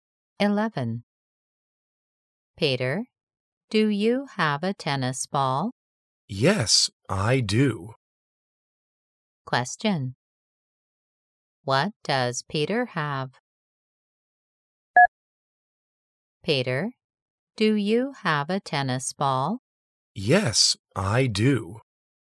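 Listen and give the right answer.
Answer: A tennis ball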